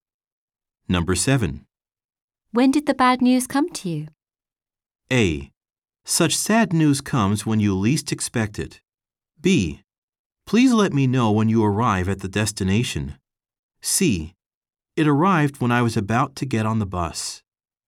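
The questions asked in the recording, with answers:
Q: When did the bad news come to you?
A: C: It arrived when I was about to get on the bus.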